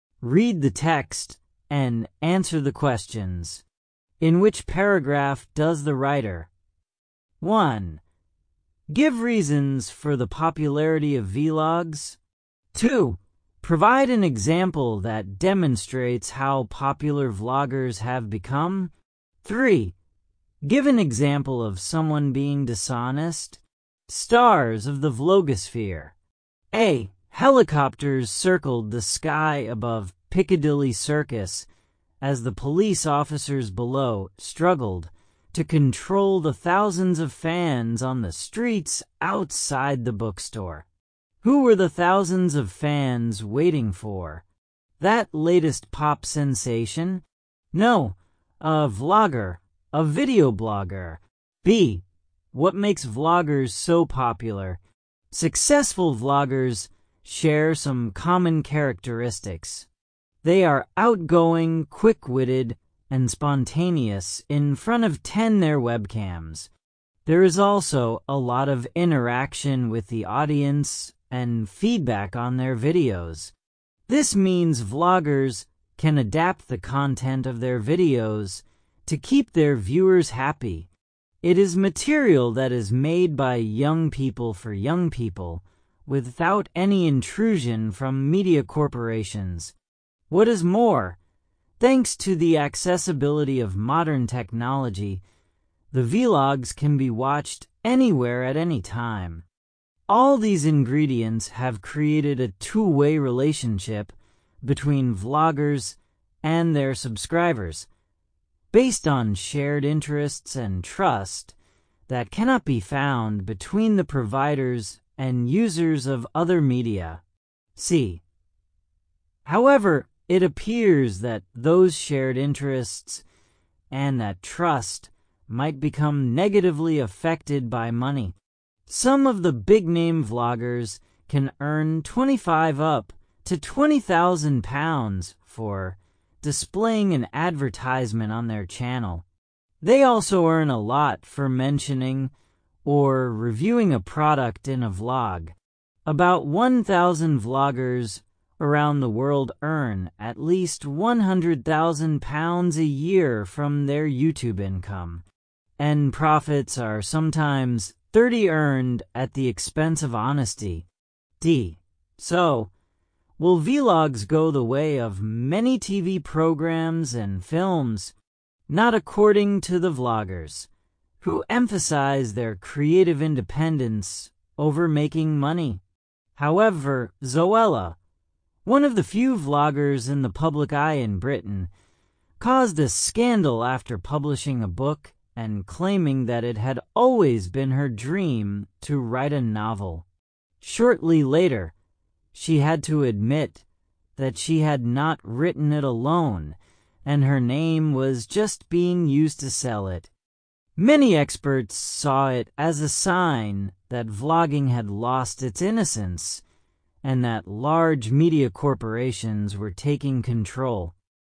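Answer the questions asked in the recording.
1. Paragraph B
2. Paragraph A
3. Paragraph D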